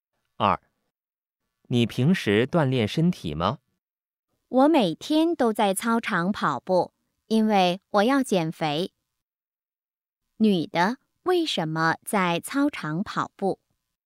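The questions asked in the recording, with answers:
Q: 女的为什么在操场跑步?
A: 因为她要减肥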